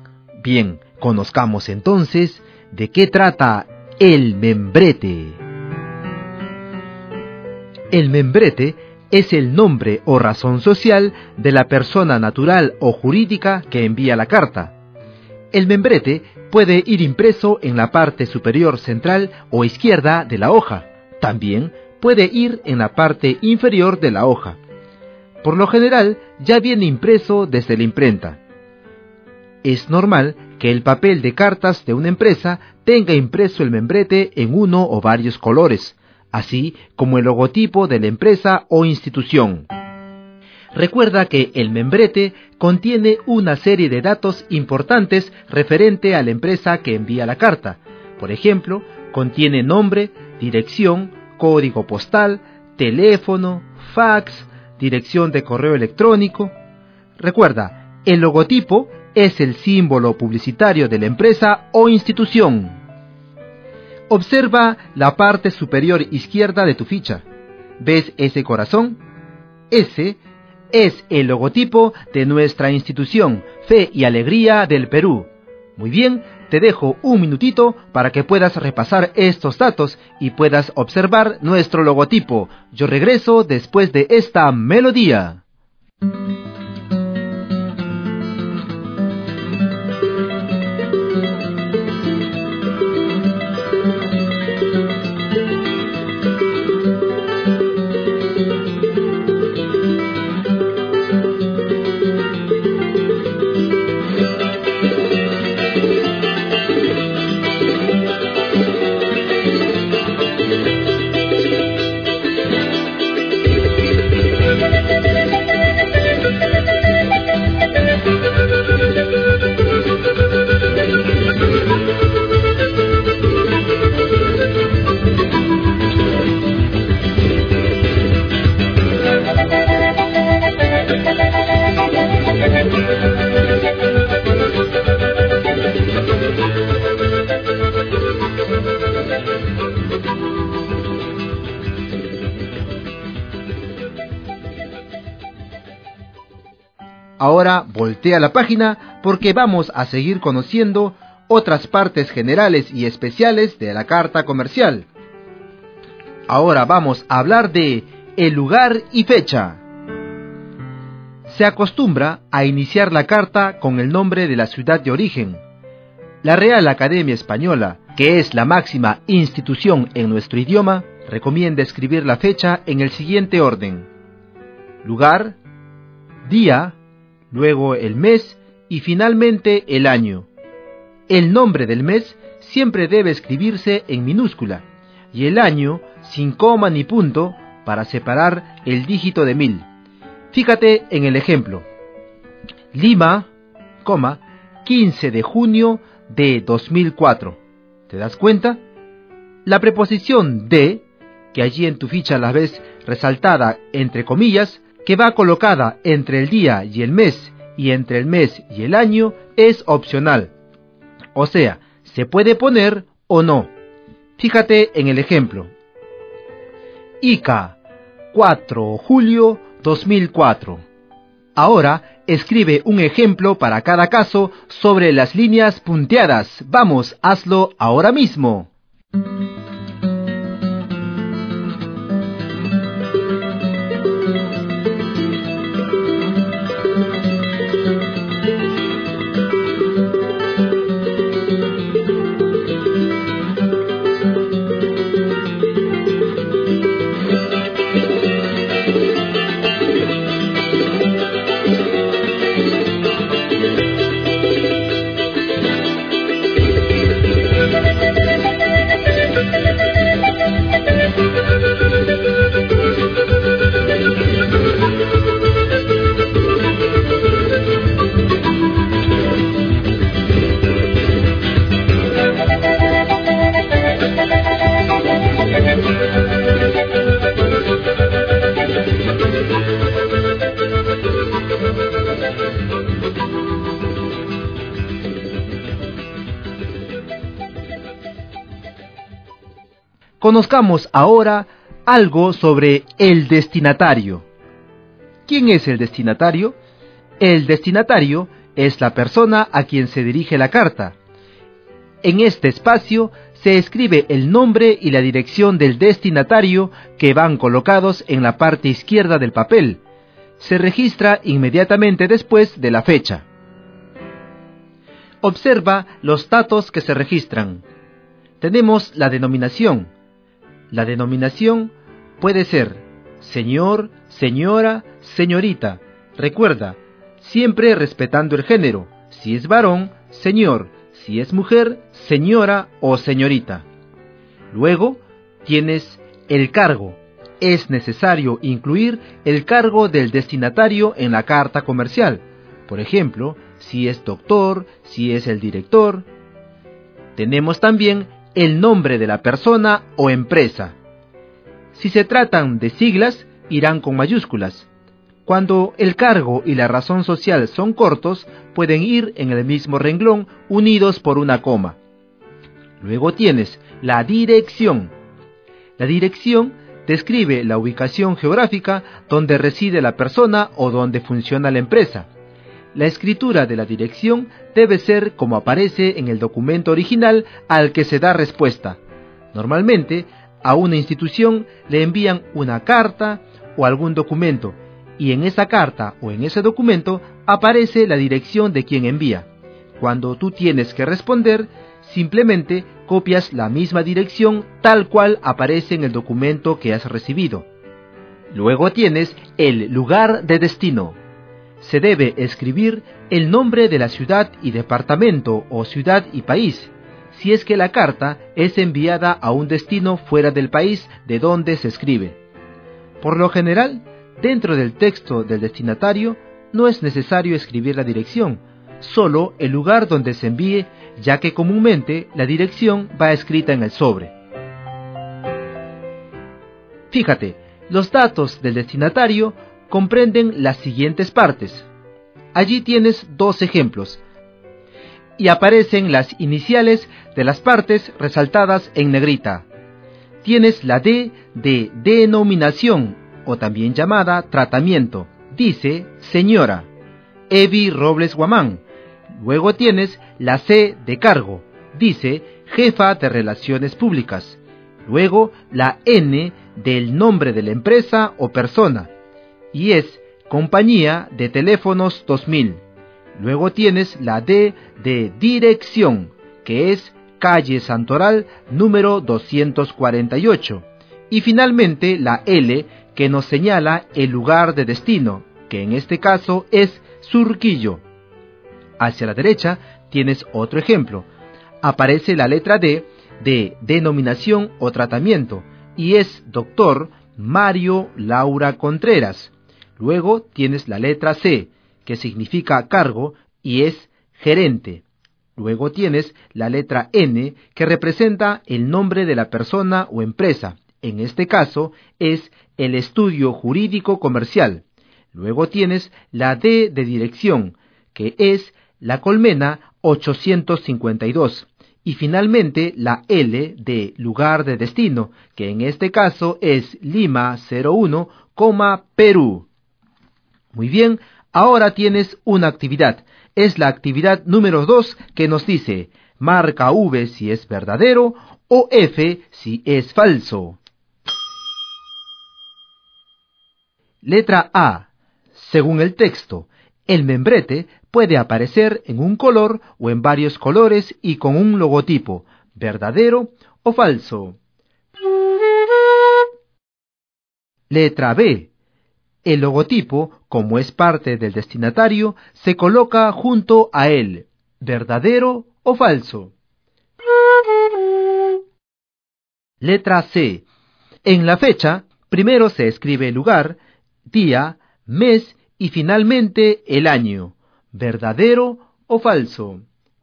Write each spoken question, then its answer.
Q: Letra A. Según el texto, el membrete puede aparecer en un color o en varios colores y con un logotipo, verdadero o falso.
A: Esta alternativa es verdadera.

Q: Letra B. El logotipo, como es parte del destinatario, se coloca junto a él, verdadero o falso.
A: Esta alternativa es falsa.

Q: Letra C. En la fecha, primero se escribe el lugar, día, mes y finalmente el año, verdadero o falso.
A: Esta alternativa es verdadera y puedes confirmarla mirando en la parte superior de esta página número 2.